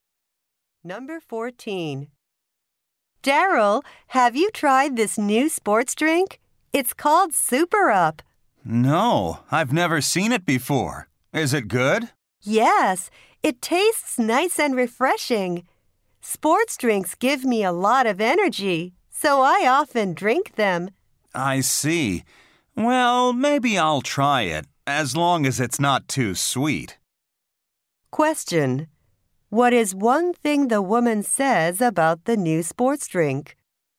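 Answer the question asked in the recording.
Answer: It tastes nice and refreshing.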